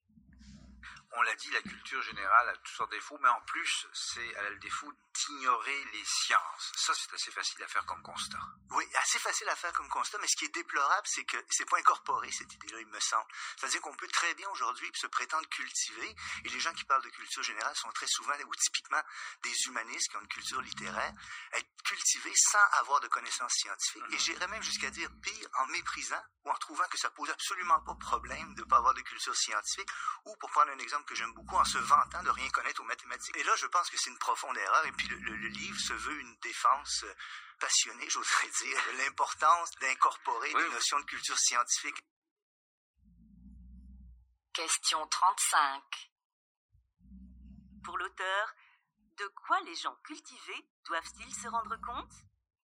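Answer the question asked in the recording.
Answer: Que la culture générale doit inclure des connaissances scientifiques; ignorer les sciences est une profonde erreur.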